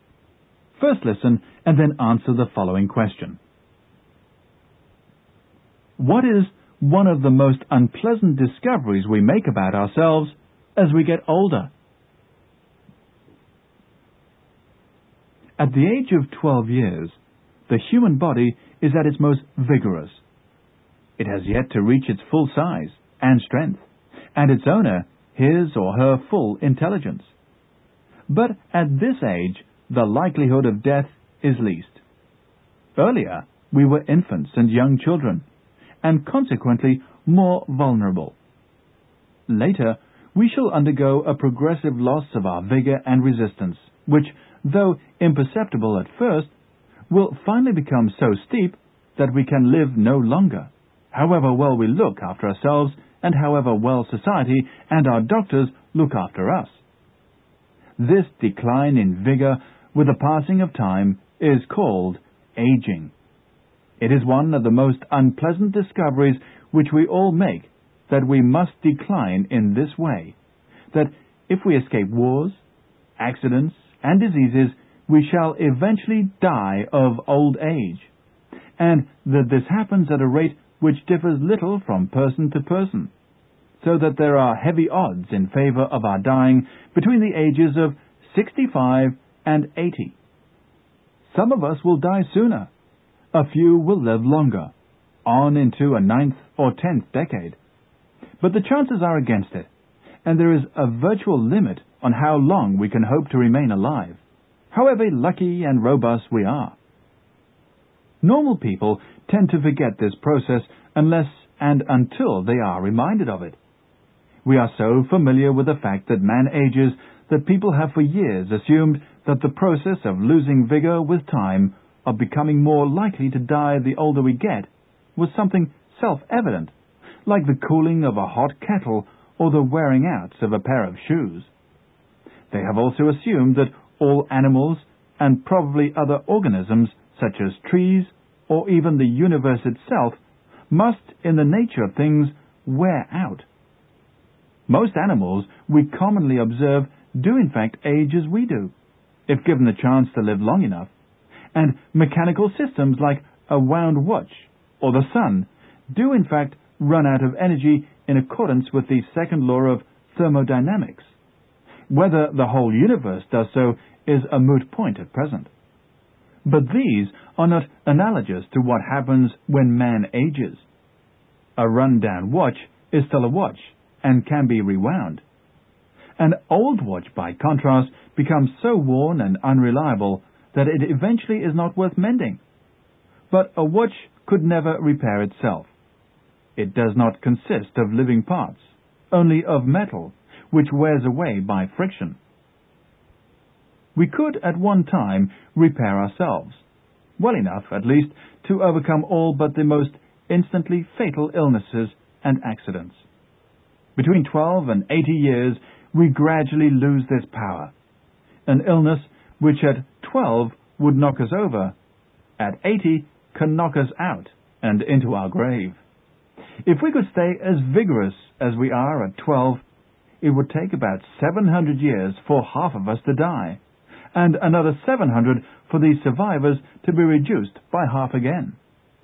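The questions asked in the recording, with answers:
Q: What is one of the most unpleasant discoveries we make about ourselves as we get older?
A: That we must decline in vigor and eventually die of old age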